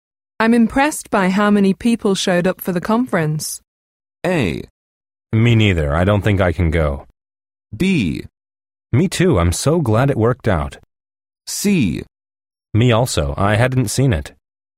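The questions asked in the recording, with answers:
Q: I'm impressed by how many people showed up for the conference.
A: B: Me too. I'm so glad it worked out.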